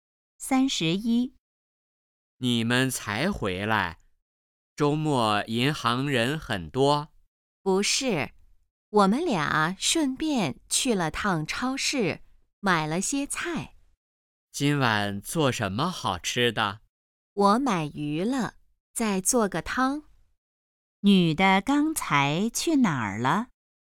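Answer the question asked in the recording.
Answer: 银行和超市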